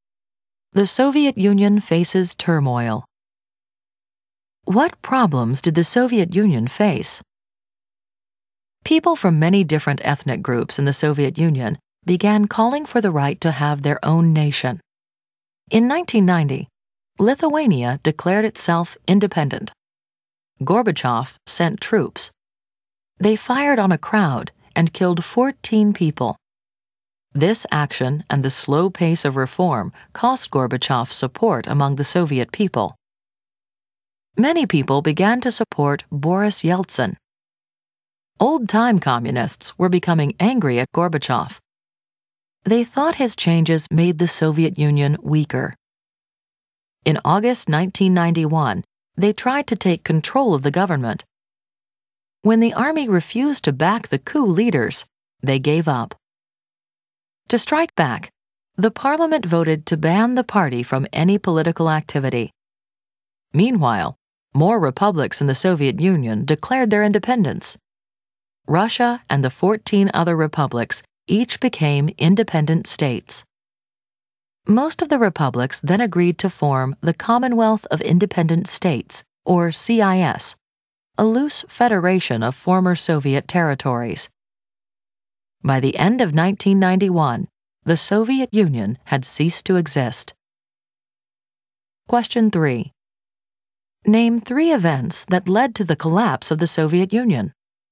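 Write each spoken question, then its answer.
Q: Name three events that led to the collapse of the Soviet Union.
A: Ethnic groups called for independence (Lithuania declared independence); the failed 1991 coup by old-time communists; the republics declared independence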